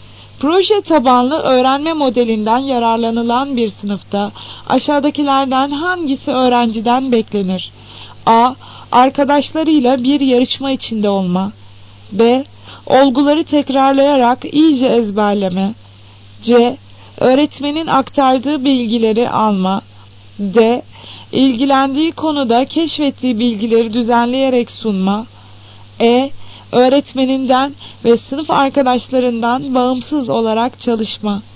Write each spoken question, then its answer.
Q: Proje tabanlı öğrenme modelinden yararlanılan bir sınıfta aşağıdakilerden hangisi öğrenciden beklenir?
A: Cevap D şıkkı. İlgilendiği konuda keşfettiği bilgileri düzenleyerek sunma.